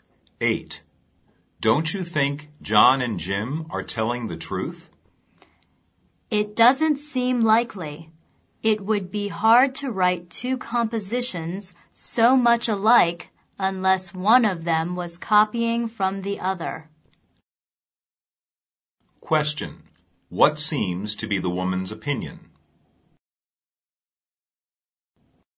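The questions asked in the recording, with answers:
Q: What seems to be the woman's opinion?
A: One of them copied from the other, so they are not telling the truth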